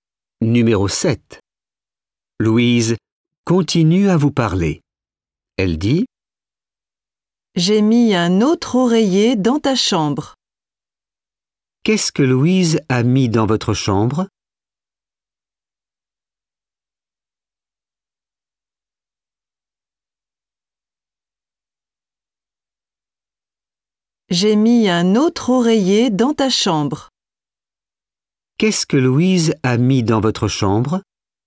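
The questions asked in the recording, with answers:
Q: Qu'est-ce que Louise a mis dans votre chambre?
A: un autre oreiller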